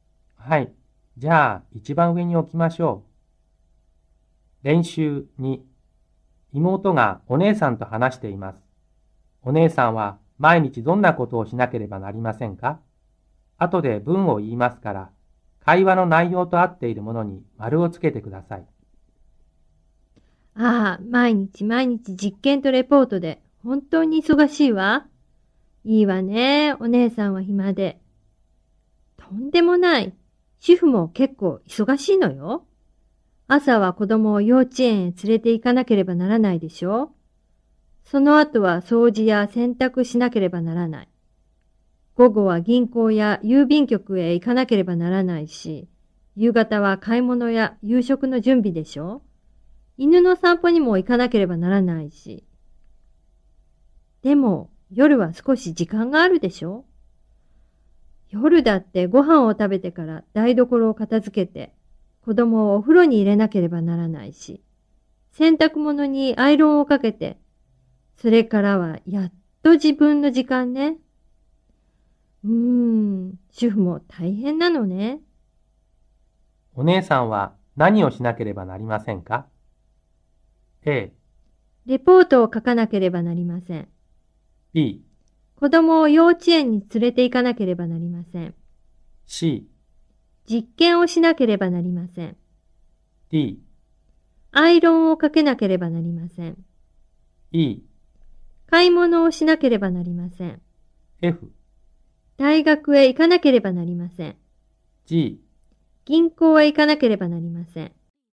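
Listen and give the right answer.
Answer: B: 子供を幼稚園に連れて行かなければなりません。 D: アイロンをかけなければなりません。 E: 買い物をしなければなりません。 G: 銀行へ行かなければなりません。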